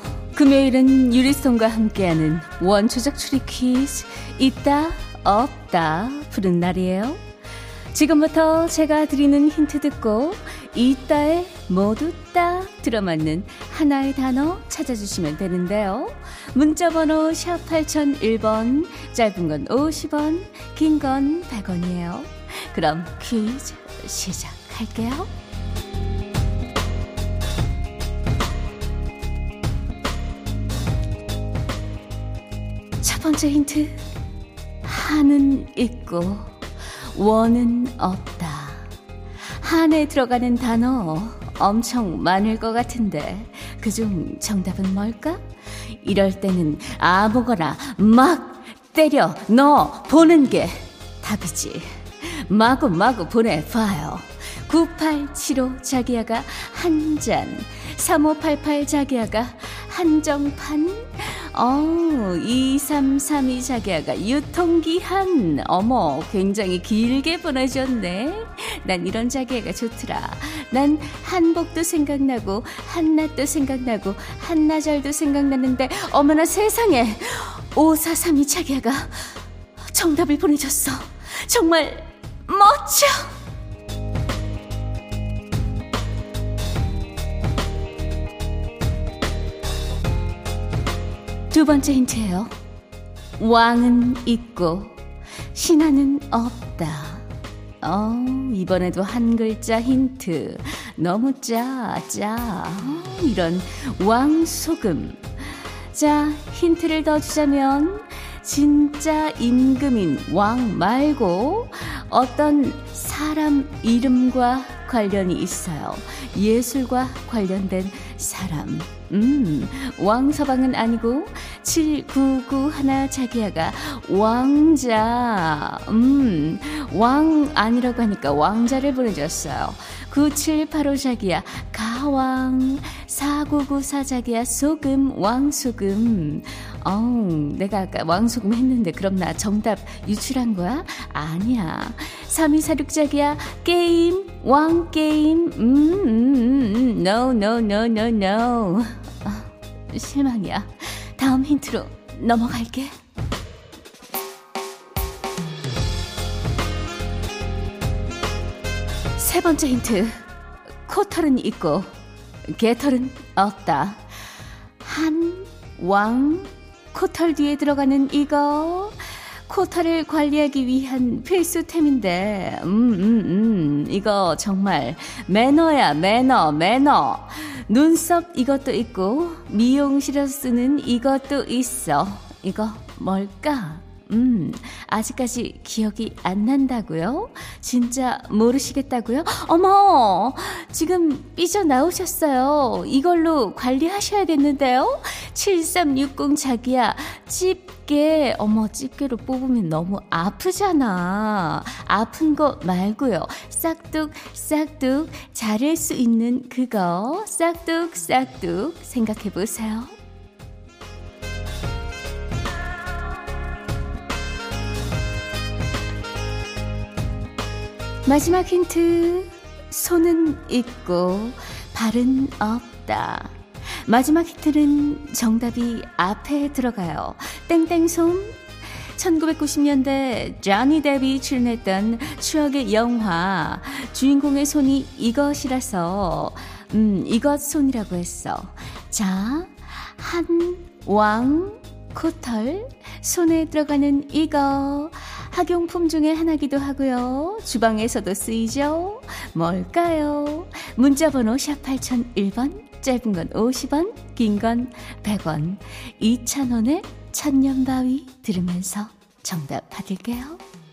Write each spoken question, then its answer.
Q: 주방에서도 쓰이죠. 뭘까요?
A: 오늘 정답은 가위였어요.